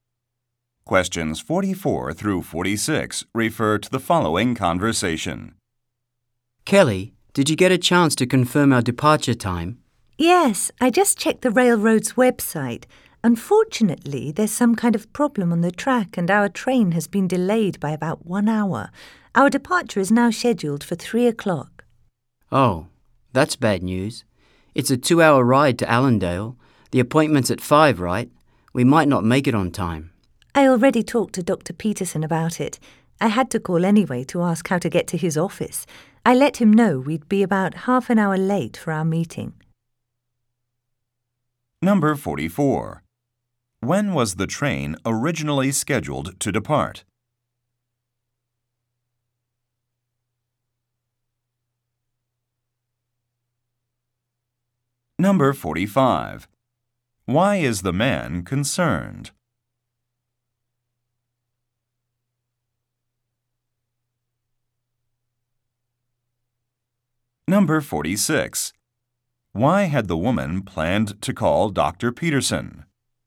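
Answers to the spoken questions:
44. At 2 o'clock
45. They might be late for the appointment
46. To ask how to get to his office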